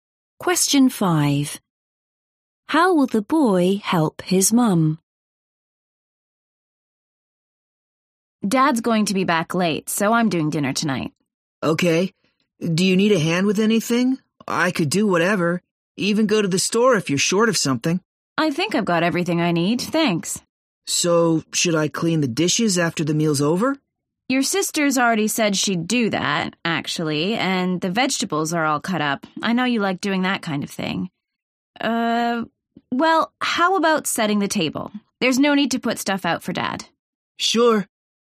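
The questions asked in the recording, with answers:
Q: How will the boy help his mum?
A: By setting the table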